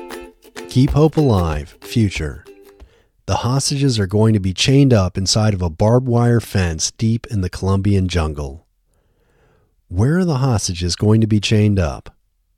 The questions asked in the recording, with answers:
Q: Where are the hostages going to be chained up?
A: The hostages are going to be chained up inside of a barbed wire fence deep in the Colombian jungle.